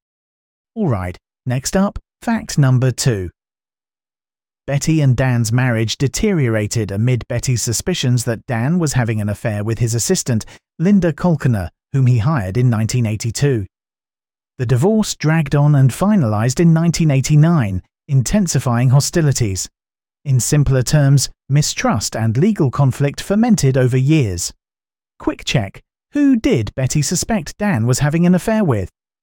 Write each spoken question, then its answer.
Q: who did Betty suspect Dan was having an affair with?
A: Linda Kolkener.